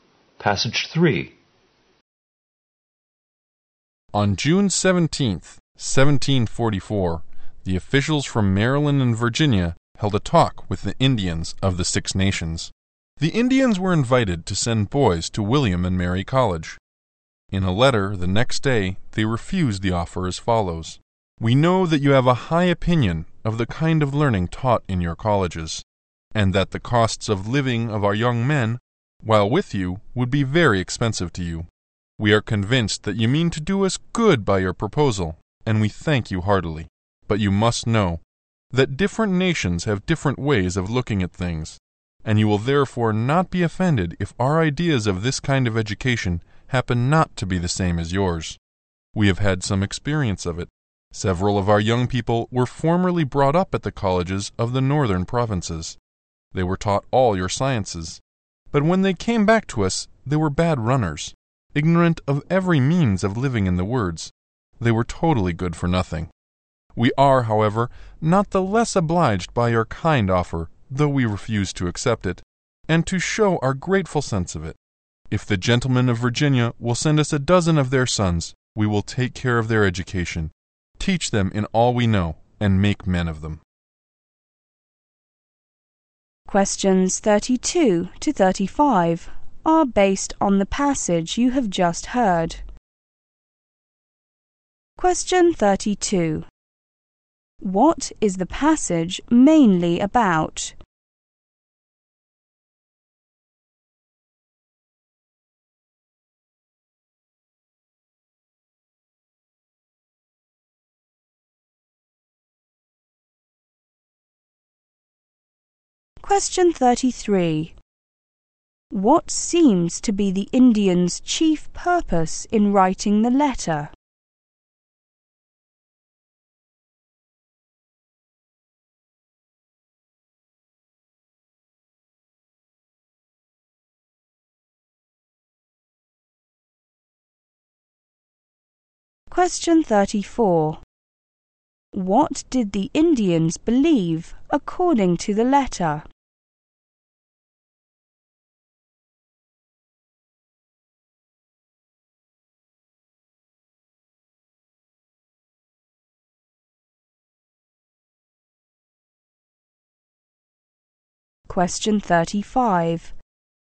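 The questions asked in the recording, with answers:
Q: What is the passage mainly about?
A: The Indians' refusal of an offer to educate their boys at William and Mary College

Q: What seems to be the Indian's chief purpose in writing the letter?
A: To politely refuse the offer

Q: Why did the Indians think that they were different from the officials' view of education?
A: Different nations have different ways of looking at things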